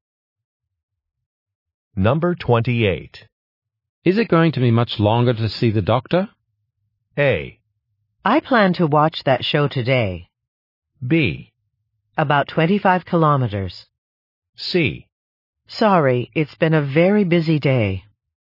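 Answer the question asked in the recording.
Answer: C: Sorry, it's been a very busy day.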